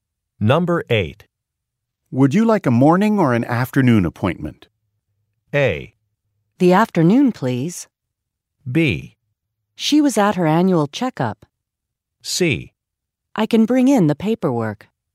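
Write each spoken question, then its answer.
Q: Would you like a morning or an afternoon appointment?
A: A: The afternoon, please.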